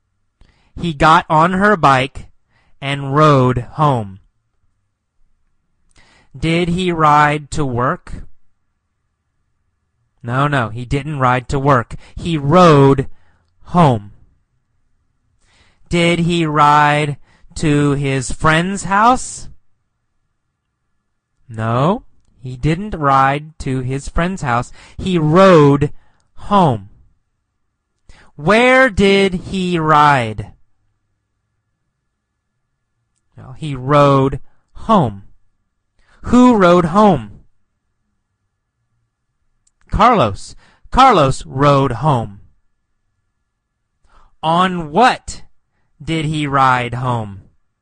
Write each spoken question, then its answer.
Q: On what did he ride home?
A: On her bike, right? He rode home on her bike.